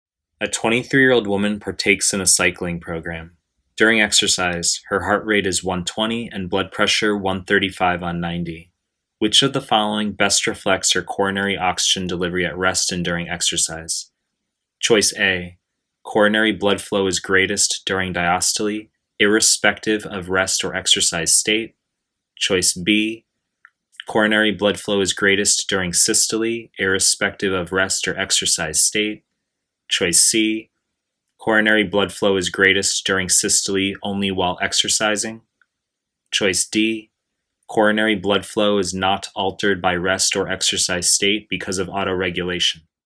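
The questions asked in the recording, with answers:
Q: Which of the following best reflects her coronary oxygen delivery at rest and during exercise?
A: A: coronary blood flow is greatest during diastole, irrespective of rest or exercise state.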